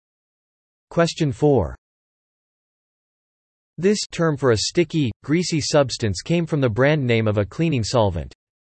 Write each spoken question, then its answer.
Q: This term for a sticky, greasy substance came from the brand name of a cleaning solvent.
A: The answer is gunk.